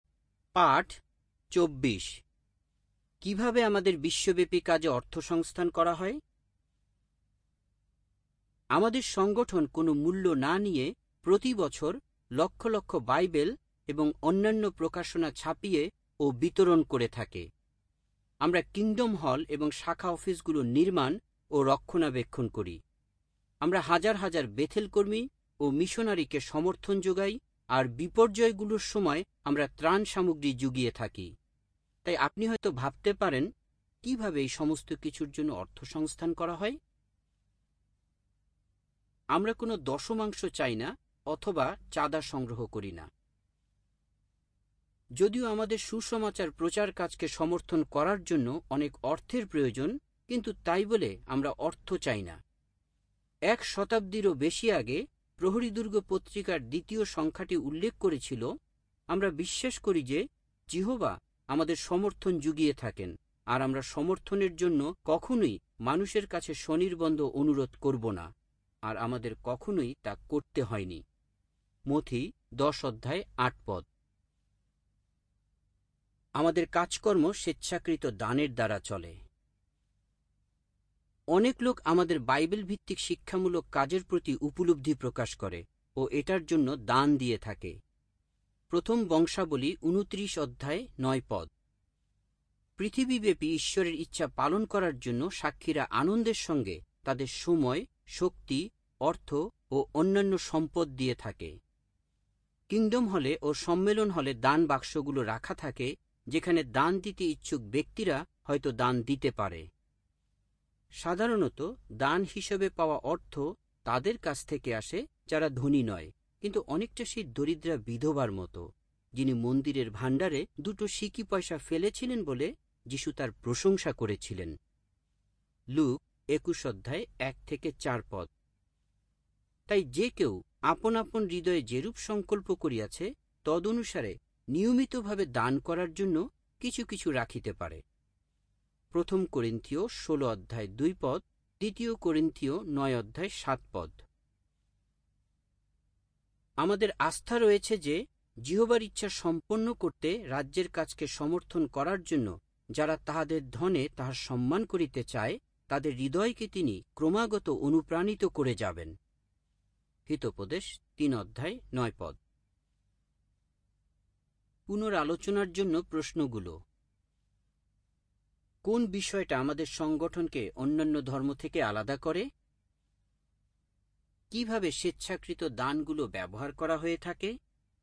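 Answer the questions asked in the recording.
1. আমরা কোনো দশমাংশ চাই না বা চাঁদা সংগ্রহ করি না; কাজ স্বেচ্ছাকৃত দানে চলে
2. Bible ও প্রকাশনা ছাপানো ও বিতরণ, kingdom হল ও শাখা office নির্মাণ ও রক্ষণাবেক্ষণ, Bethell কর্মী ও মিশনারিদের সমর্থন এবং দুর্যোগে ত্রাণ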